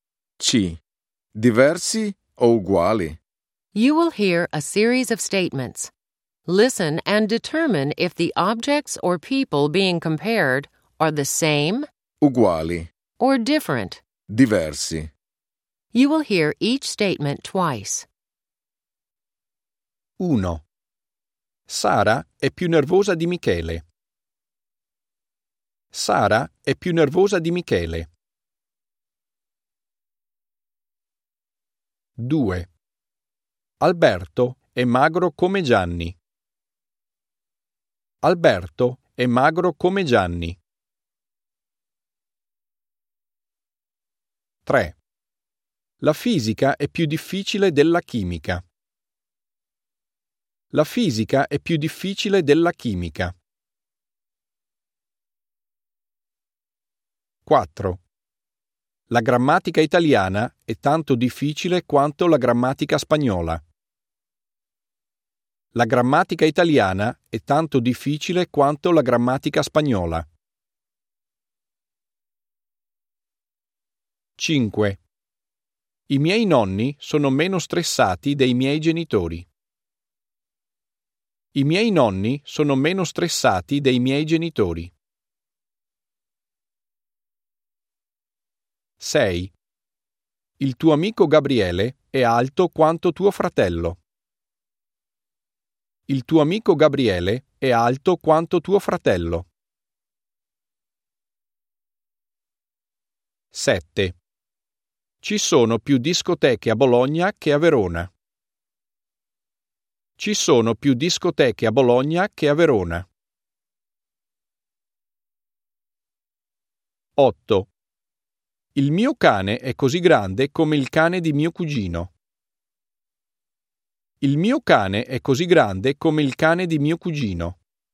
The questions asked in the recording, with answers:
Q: Sara è più nervosa di Michele.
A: 1. Diversi.

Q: Alberto è magro come Gianni.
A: 2. Uguali.

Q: La fisica è più difficile della chimica.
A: 3. Diversi.

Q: La grammatica italiana è tanto difficile quanto la grammatica spagnola.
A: 4. Uguali.

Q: I miei nonni sono meno stressati dei miei genitori.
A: 5. Diversi.

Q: Il tuo amico Gabriele è alto quanto tuo fratello.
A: 6. Uguali.

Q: Ci sono più discoteche a Bologna che a Verona.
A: 7. Diversi.

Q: Il mio cane è così grande come il cane di mio cugino.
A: 8. Uguali.